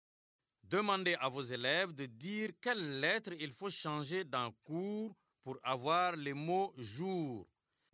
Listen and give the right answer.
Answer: Monsieur, j'efface la lettre C et j'écris la lettre J.